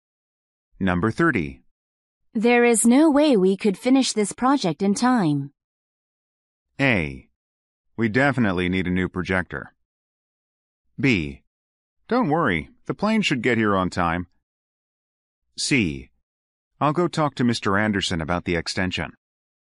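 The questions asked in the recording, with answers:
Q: There is no way we could finish this project in time.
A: C: I'll go talk to Mr. Anderson about the extension.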